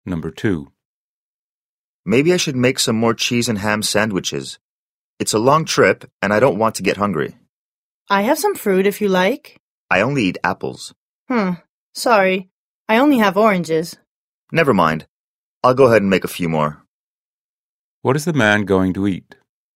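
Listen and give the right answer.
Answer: Cheese and ham sandwiches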